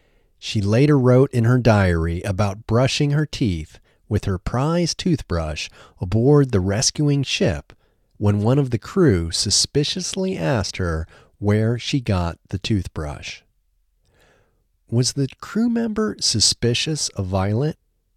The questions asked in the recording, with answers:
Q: Was the crew member suspicious of Violet?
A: Yes, the crew member was suspicious of Violet.